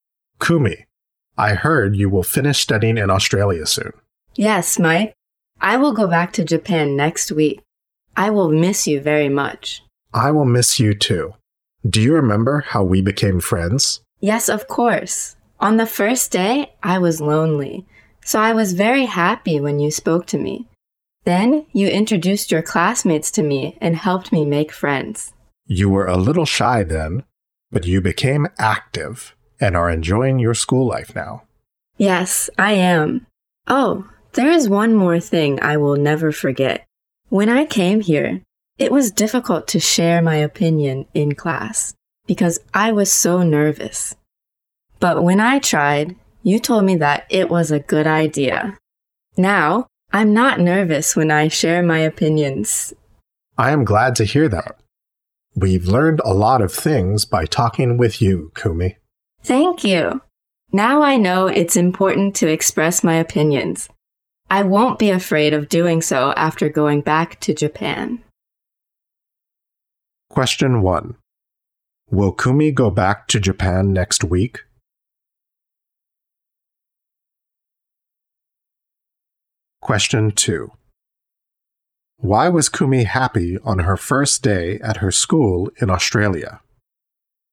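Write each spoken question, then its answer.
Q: Will Kumi go back to Japan next week?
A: Yes, she will.

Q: Why was Kumi happy on her first day at her school in Australia?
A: Because Mike spoke to her.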